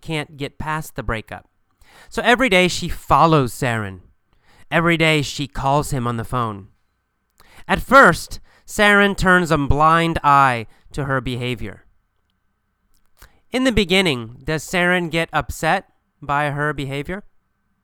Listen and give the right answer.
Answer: No, in the beginning he turns a blind eye.